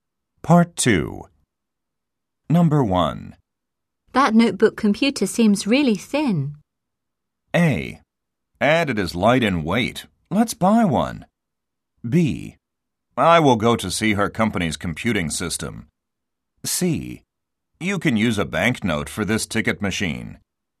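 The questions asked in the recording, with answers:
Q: That notebook computer seems really thin.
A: A: And it is light in weight. Let's buy one.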